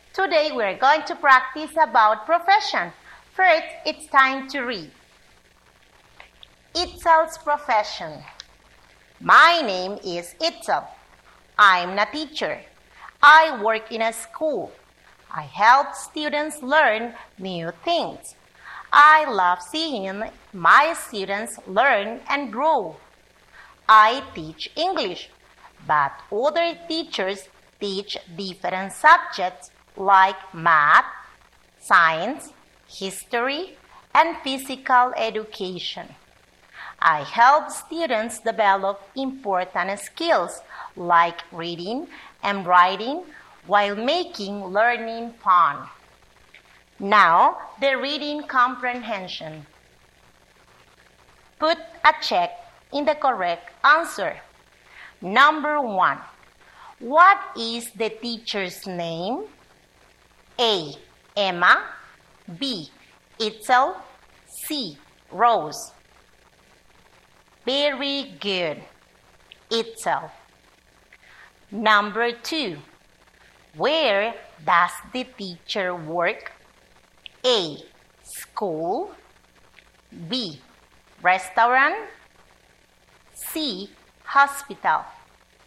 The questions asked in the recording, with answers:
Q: what is the teacher's name?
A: Very good. Itzel.

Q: where does the teacher work?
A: Very good. School.